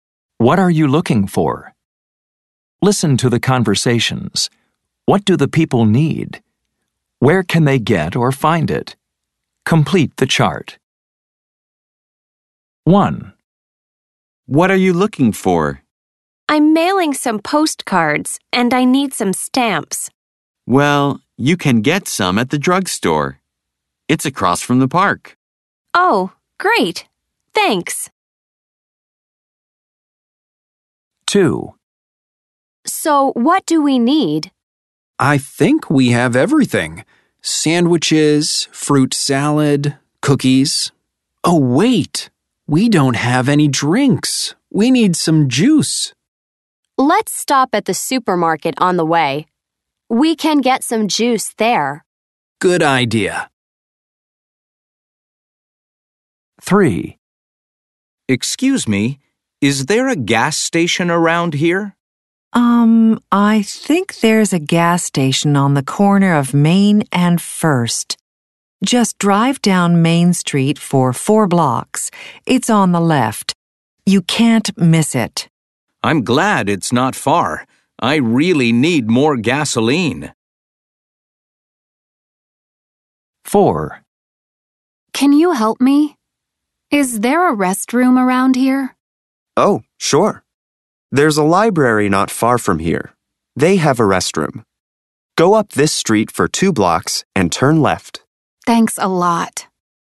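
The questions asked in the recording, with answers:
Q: What do the people need? Where can they get or find it?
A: Stamps, at the drugstore

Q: What do the people need? Where can they get or find it?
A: Juice, at the supermarket

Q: What do the people need? Where can they get or find it?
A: Gasoline, at the gas station

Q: What do the people need? Where can they get or find it?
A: A restroom, at the library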